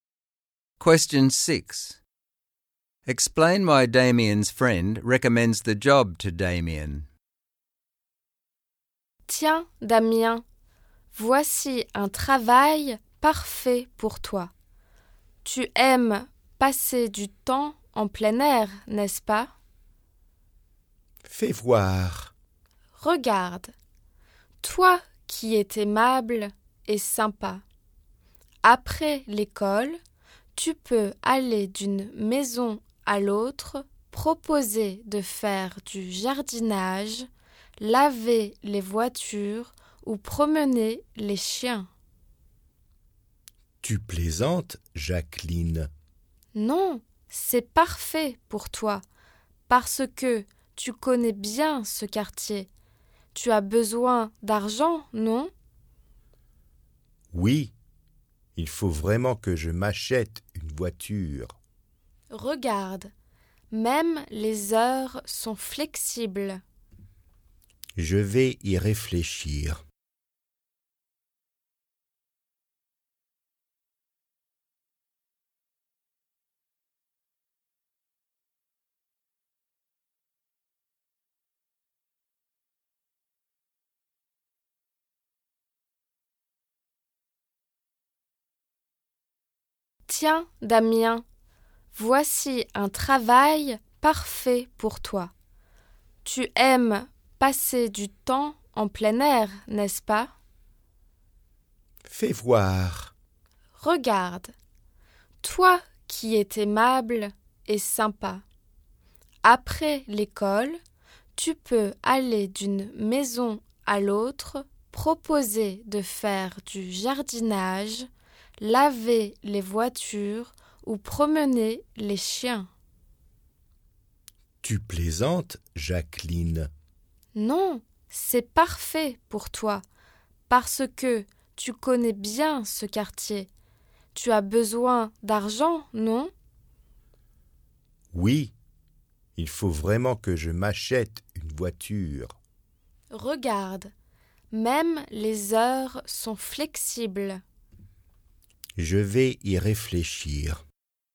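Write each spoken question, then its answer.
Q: Explain why Damien's friend recommends the job to Damien.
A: He likes being outdoors, is friendly, knows the neighbourhood, needs money, and the hours are flexible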